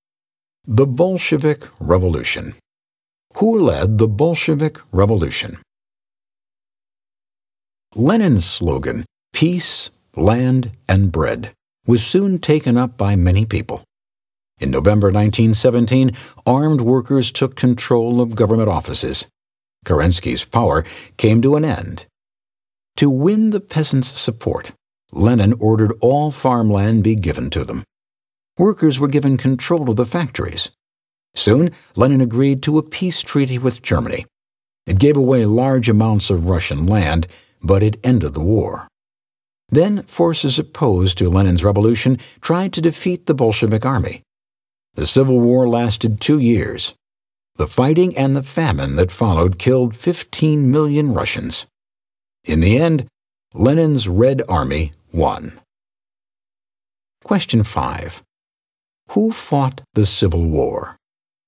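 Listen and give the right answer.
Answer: Lenin's Red Army (the Bolsheviks) against forces opposed to the revolution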